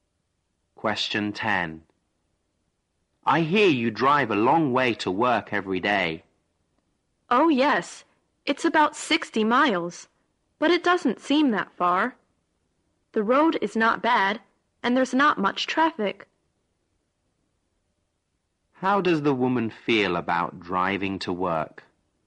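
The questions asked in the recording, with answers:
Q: How does the woman feel about driving to work?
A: She doesn't mind it; it doesn't seem that far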